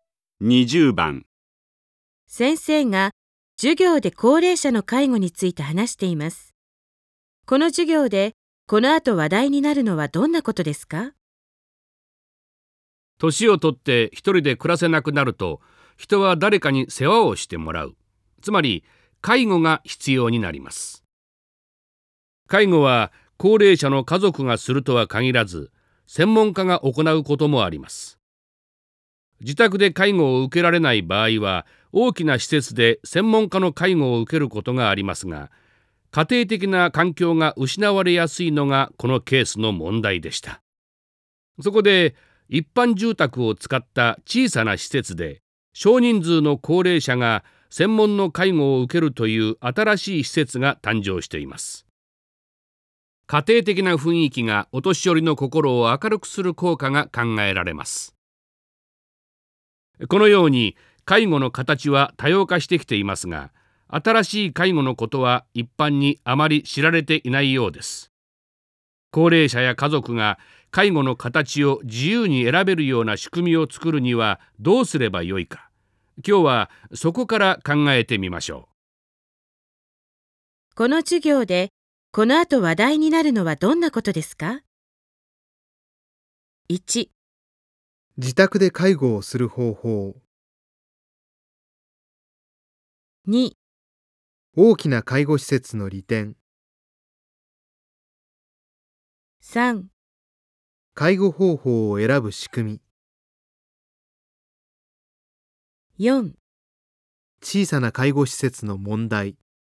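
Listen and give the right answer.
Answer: 3: 介護方法を選ぶ仕組み。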